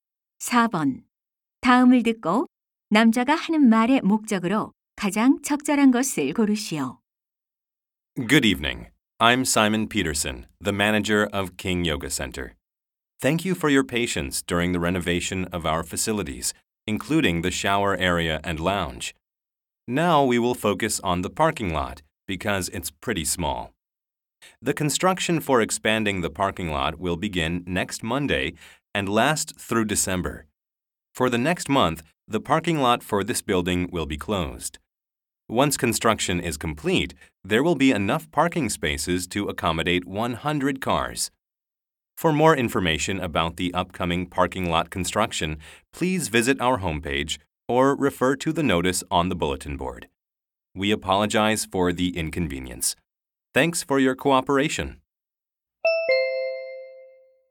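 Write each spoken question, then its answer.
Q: 다음을 듣고 남자가 하는 말의 목적으로 가장 적절한 것을 고르시오.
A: 주차장 확장 공사를 안내하려고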